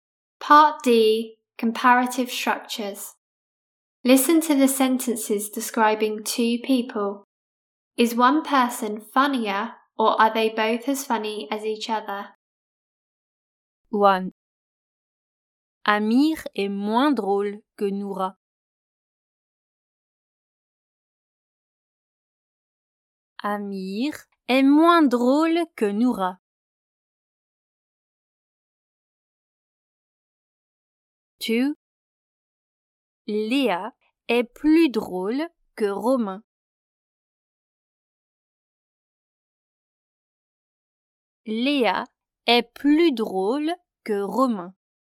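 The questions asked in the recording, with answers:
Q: Amir est moins drôle que Noura.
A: one person is funnier (Noura)

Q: Léa est plus drôle que Romain.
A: one person is funnier (Léa)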